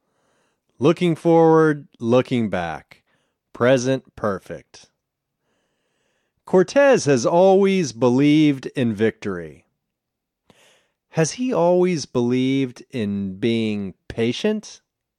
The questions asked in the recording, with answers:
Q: Has he always believed in being patient?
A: No, he hasn't always believed in being patient.